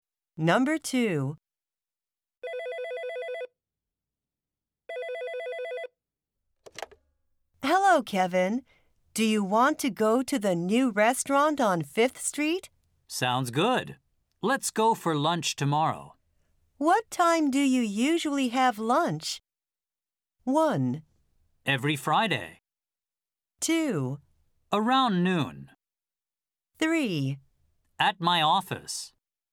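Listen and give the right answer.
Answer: 2: Around noon.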